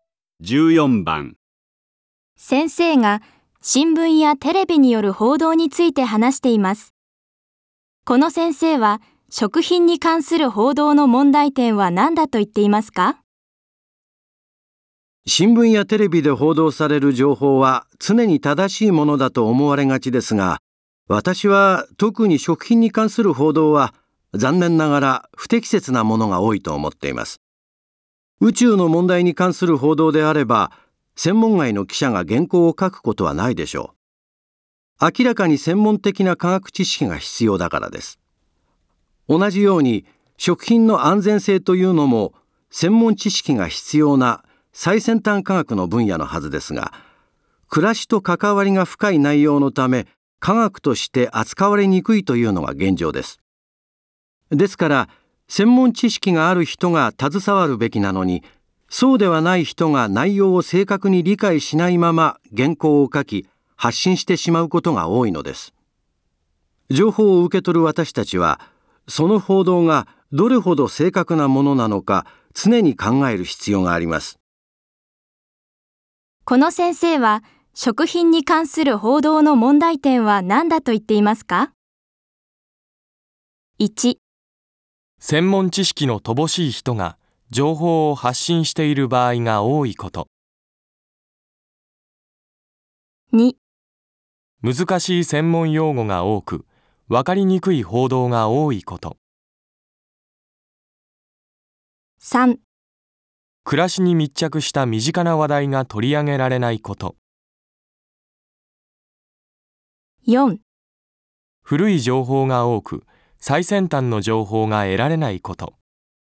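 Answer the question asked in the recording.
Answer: 1: 専門知識の乏しい人が情報を発信している場合が多いこと。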